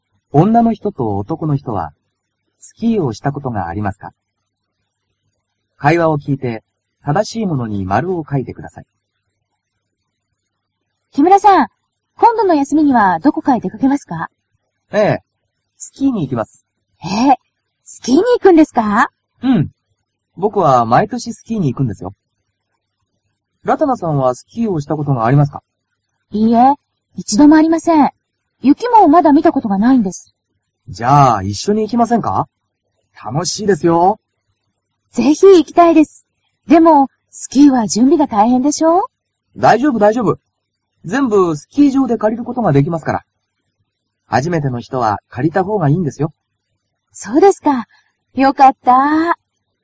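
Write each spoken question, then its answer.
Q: 女の人と男の人は、スキーをしたことがありますか?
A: 男の人(木村さん)はあります(毎年行く)。女の人(ラタナさん)は一度もありません。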